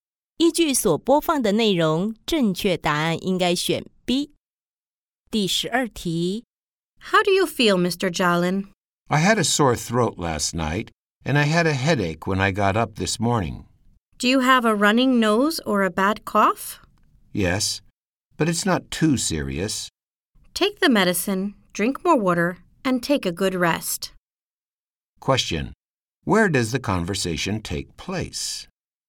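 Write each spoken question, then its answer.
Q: Question: Where does the conversation take place?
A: At a doctor's office (clinic)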